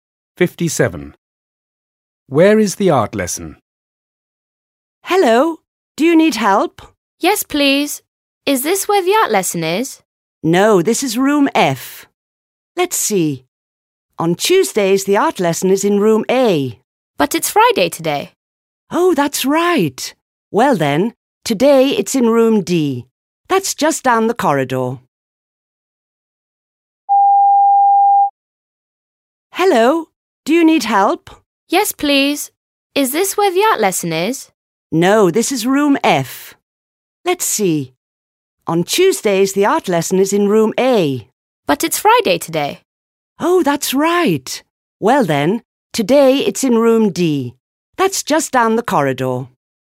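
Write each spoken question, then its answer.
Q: Where is the art lesson?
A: Room D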